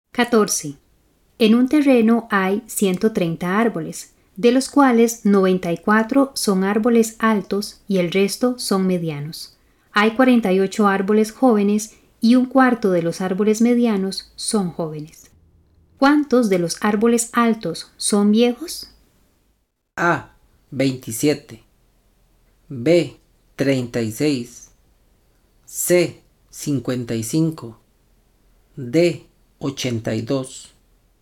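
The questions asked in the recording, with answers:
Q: ¿Cuántos de los árboles altos son viejos?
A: C: 55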